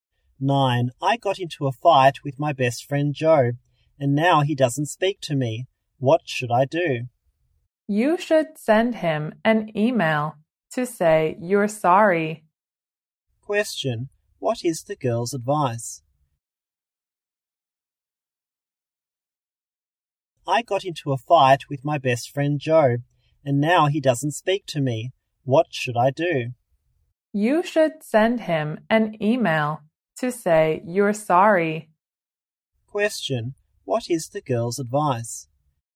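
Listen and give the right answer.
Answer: Send Joe an email to say sorry.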